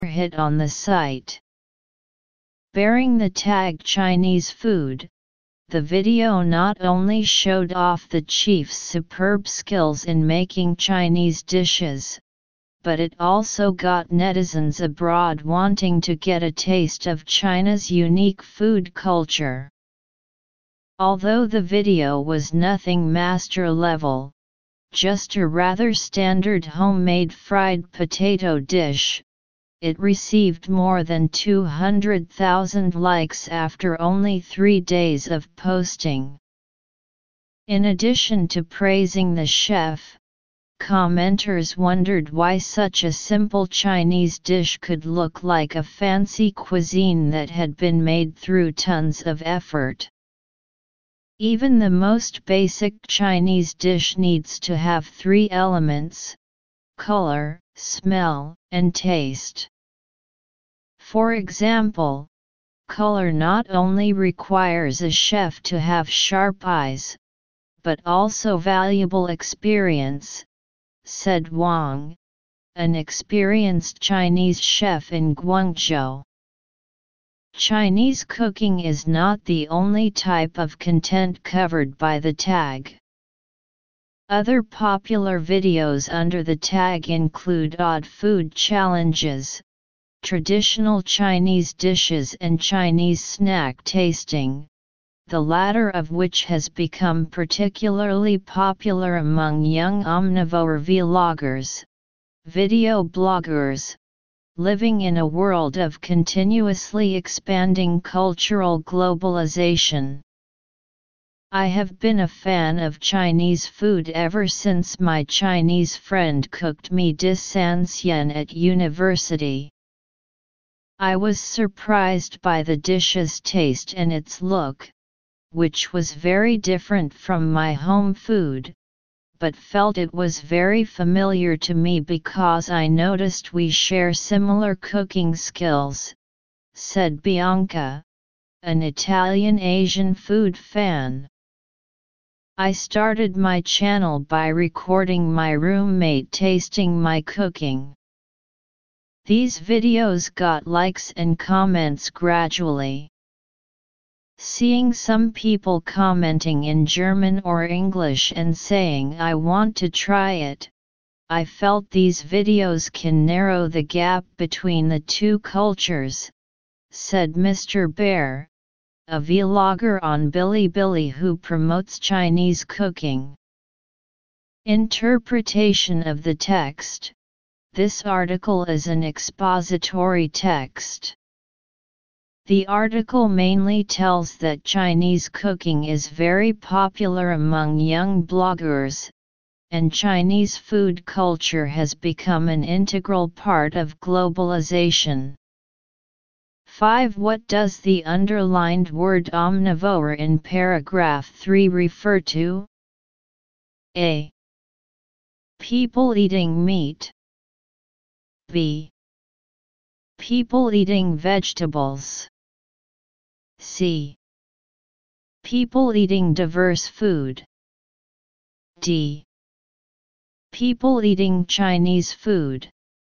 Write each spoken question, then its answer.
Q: What does the underlined word omnivore in paragraph 3 refer to?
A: Choose C